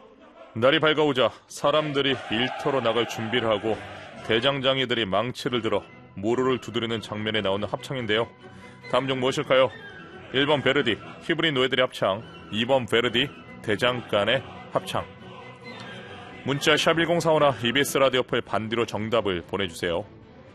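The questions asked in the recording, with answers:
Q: 다음 중 무엇일까요? 1번 베르디, 히브리 노예들의 합창. 2번 베르디, 대장간의 합창.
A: 2: 베르디, 대장간의 합창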